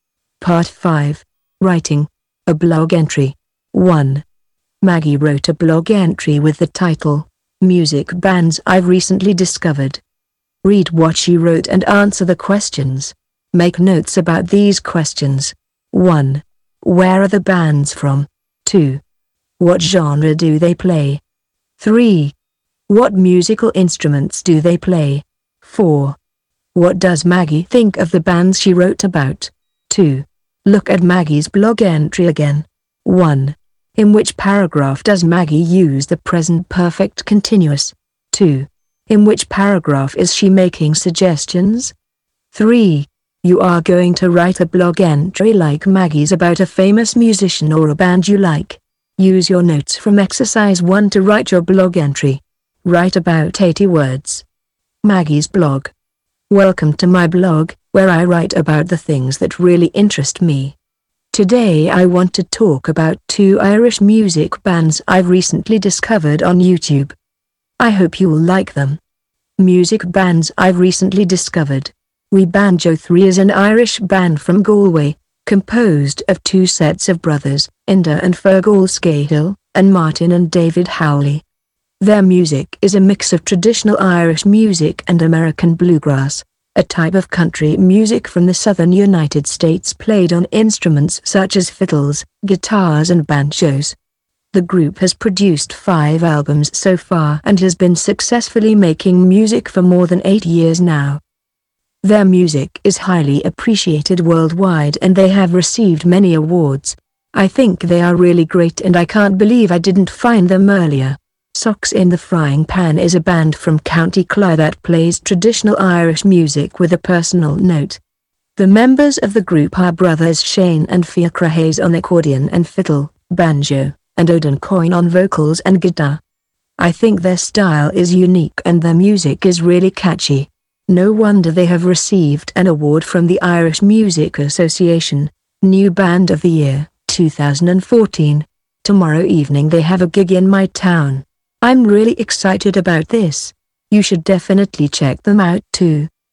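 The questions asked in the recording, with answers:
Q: What musical instruments do they play?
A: Fiddles, guitars, banjos, accordion

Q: What does Maggie think of the bands she wrote about?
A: She thinks they are great; their style is unique and their music catchy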